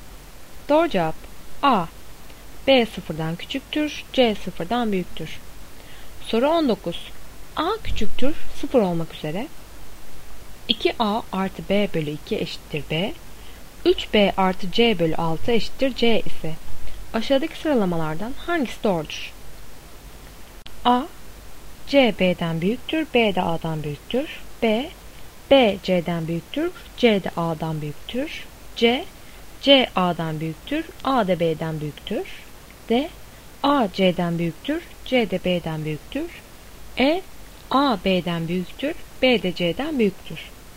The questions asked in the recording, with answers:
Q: 3B artı C bölü 6 eşittir C ise aşağıdaki sıralamalardan hangisi doğrudur?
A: Doğru cevap D. A C'den büyüktür, C de B'den büyüktür.